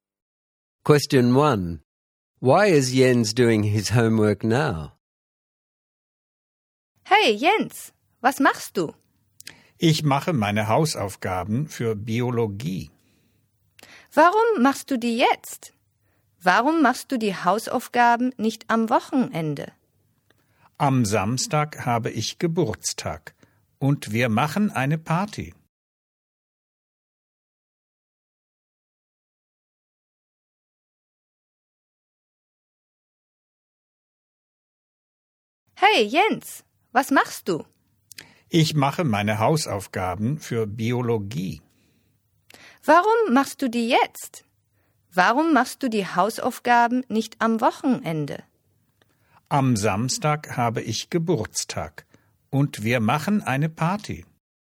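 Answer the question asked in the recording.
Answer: It's his birthday on Saturday and he's having a party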